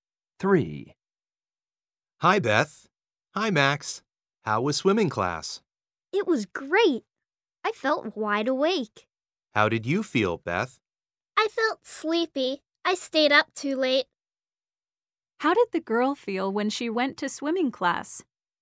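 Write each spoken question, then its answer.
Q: How did the girl feel when she went to swimming class?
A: sleepy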